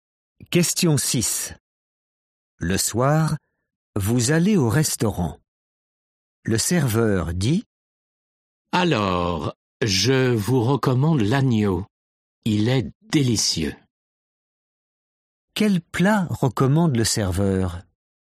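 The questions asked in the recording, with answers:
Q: Quel plat recommande le serveur?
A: l'agneau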